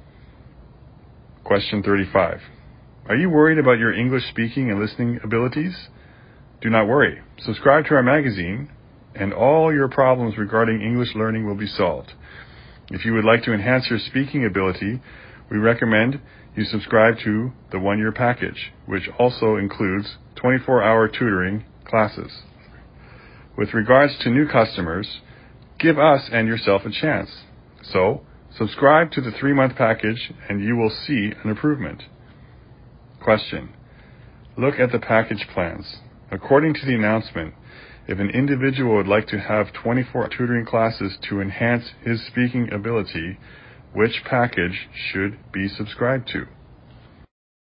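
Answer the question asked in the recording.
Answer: The one-year package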